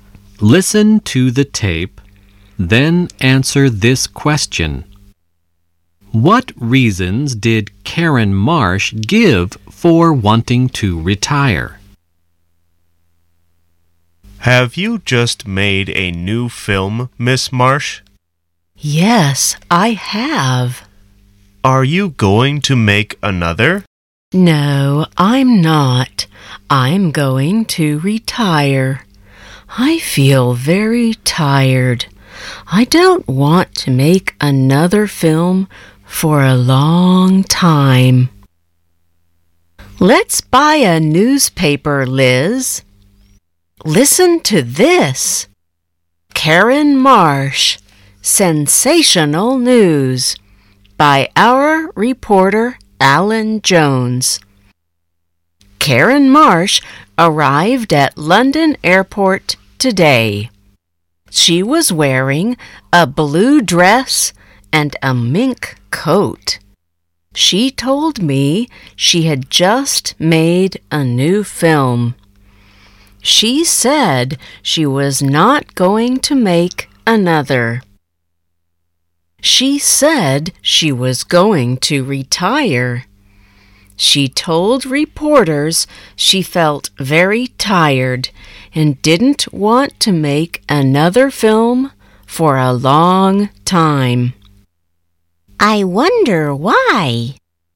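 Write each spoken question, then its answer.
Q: What reasons did Karen Marsh give for wanting to retire?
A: She felt very tired and didn't want to make another film for a long time.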